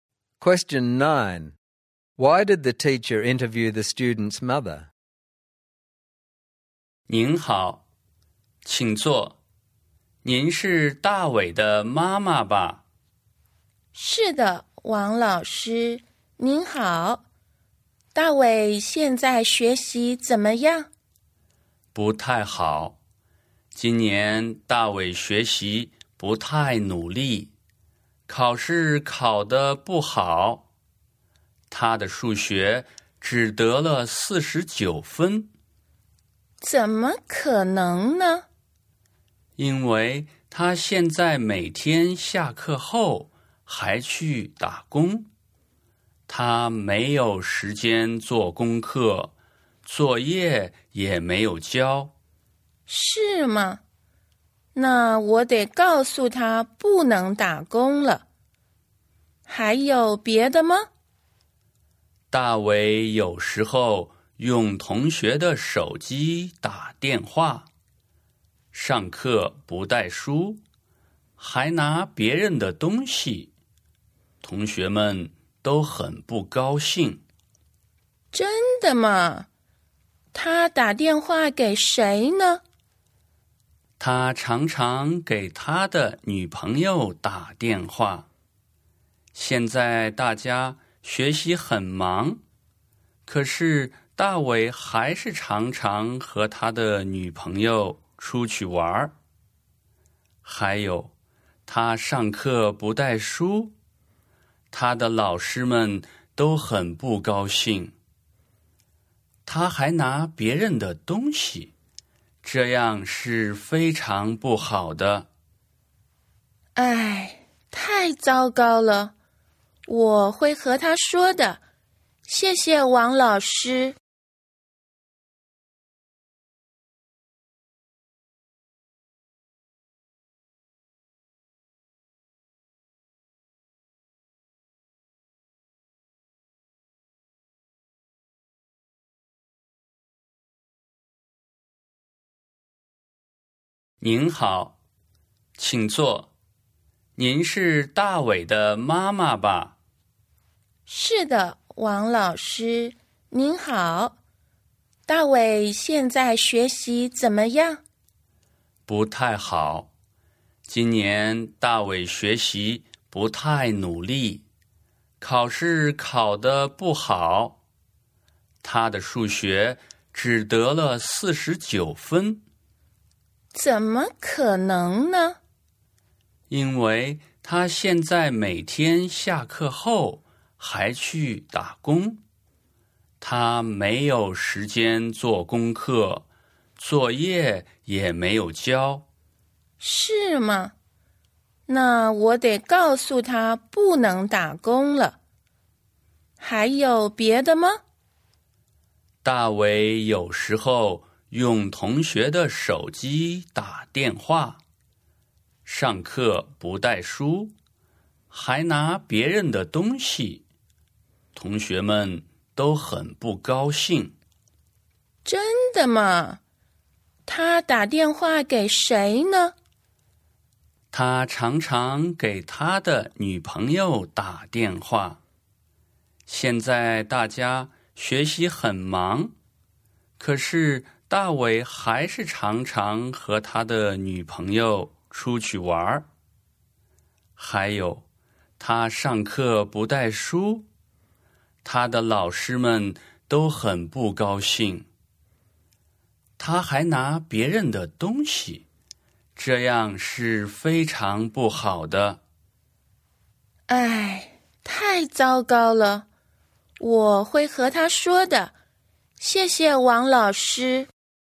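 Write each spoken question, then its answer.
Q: Why did the teacher interview the student's mother?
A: Dawei is doing badly: he works part-time, doesn't do or hand in homework, failed maths with 49, uses classmates' phones, doesn't bring books and takes other people's things.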